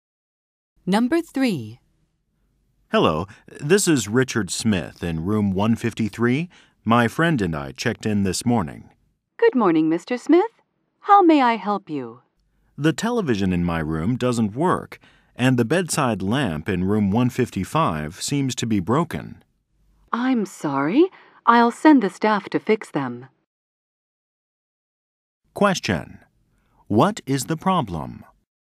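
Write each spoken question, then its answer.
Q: What is the problem?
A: The television in his room doesn't work and the bedside lamp in room 155 is broken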